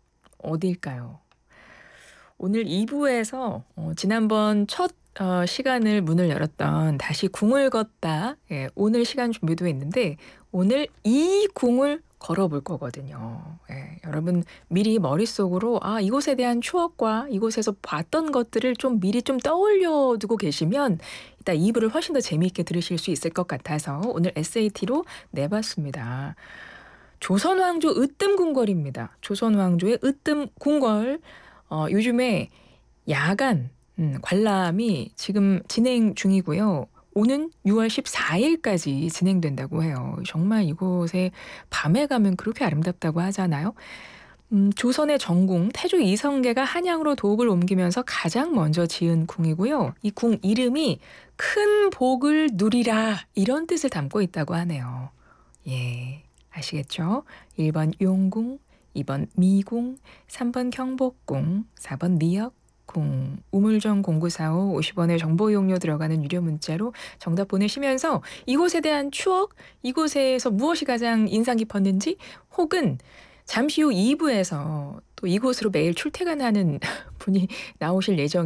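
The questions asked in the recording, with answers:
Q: 어디일까요?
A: 3: 경복궁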